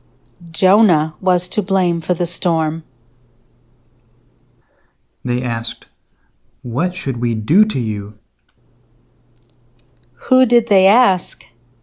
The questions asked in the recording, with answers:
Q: Who did they ask?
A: They asked Jonah.